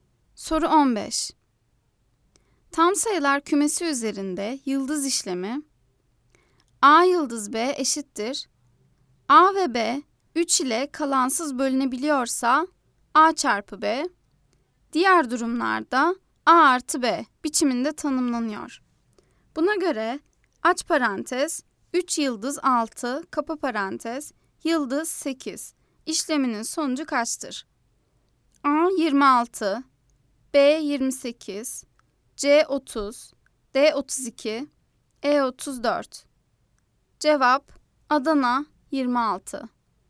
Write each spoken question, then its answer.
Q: Buna göre aç parantez 3 yıldız 6 kapa parantez yıldız 8 işleminin sonucu kaçtır?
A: Cevap Adana 26